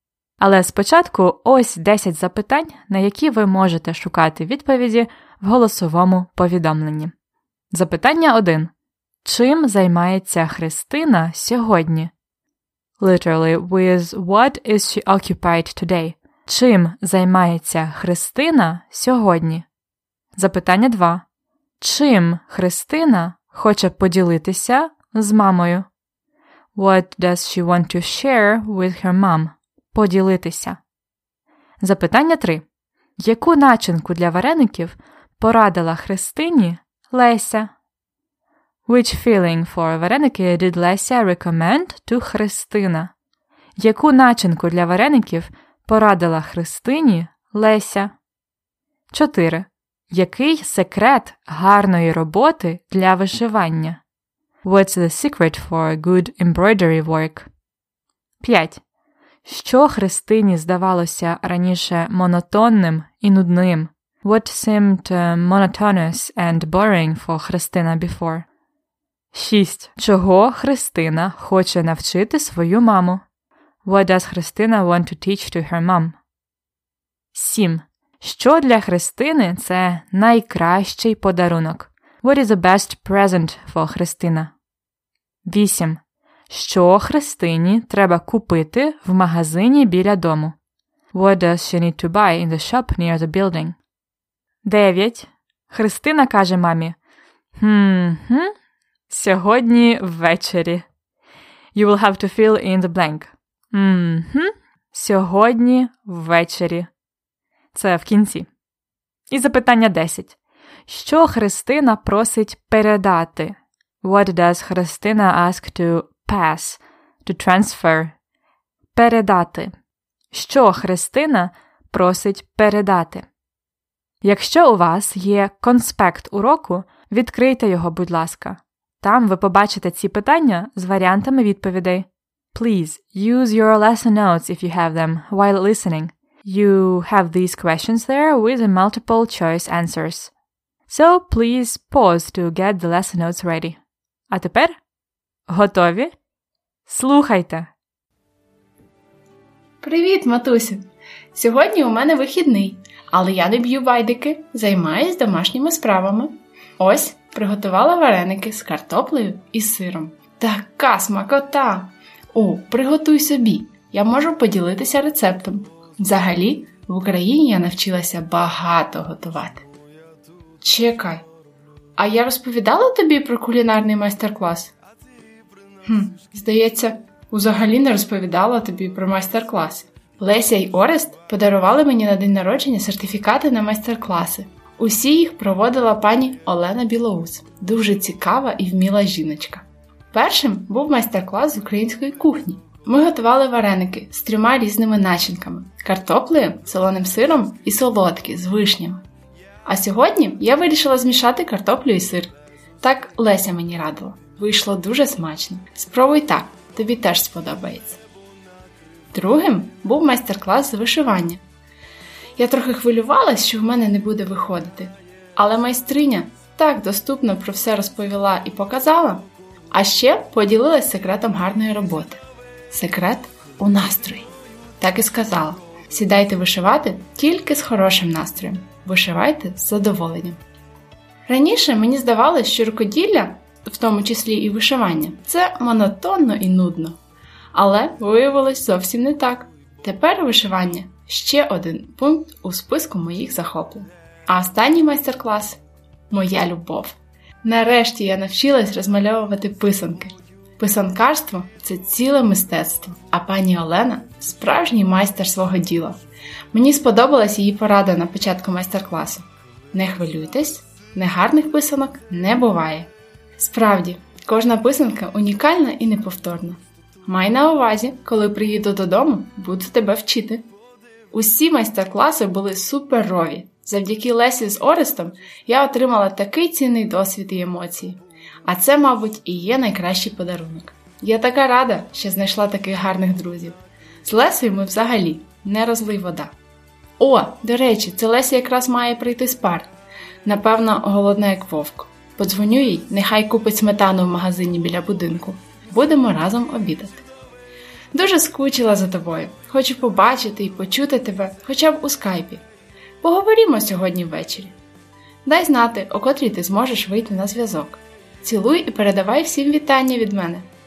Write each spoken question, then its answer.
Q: Чим займається Христина сьогодні?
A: Правильна відповідь Б. Домашніми справами.

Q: Чим Христина хоче поділитися з мамою?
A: Правильна відповідь А. Рецептом вареників.

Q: Яку начинку для вареників порадила Христині Леся.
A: Б. Картопля і сир.

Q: Який секрет гарної роботи для вишивання?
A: Правильна відповідь, звичайно, В.

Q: Що Христині здавалося раніше монотонним і нудним?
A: Правильна відповідь вишивання.

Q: Чого Христина хоче навчити свою маму?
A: Правильна відповідь Б. Розмальовувати писанки.

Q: Що для Христини це найкращий подарунок?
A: Правильна відповідь А. Враження.

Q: Що Христині треба купити в магазині біля дому?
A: Тут правильна відповідь В.

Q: Що Христина просить передати?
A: Отже, правильна відповідь В.